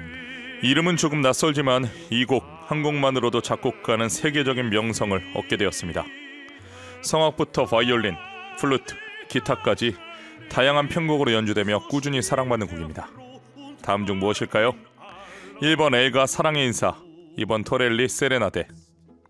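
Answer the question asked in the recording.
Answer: 2번: 토렐리 세레나데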